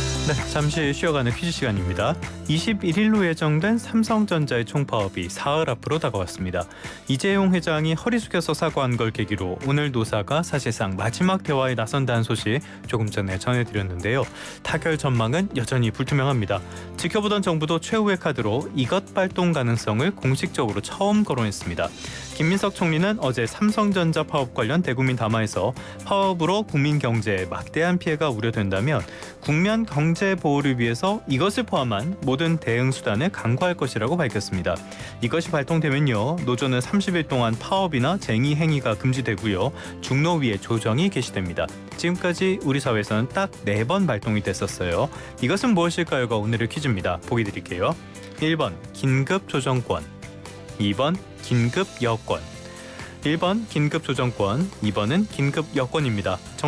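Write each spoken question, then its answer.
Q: 이것은 무엇일까요가 오늘의 퀴즈입니다.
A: 1번: 긴급조정권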